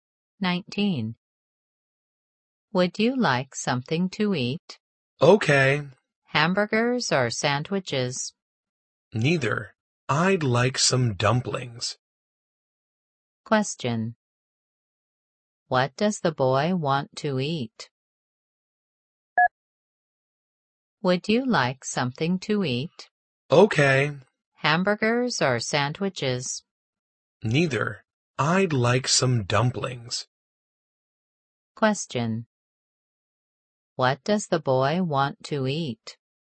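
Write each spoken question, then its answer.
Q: What does the boy want to eat?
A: Dumplings.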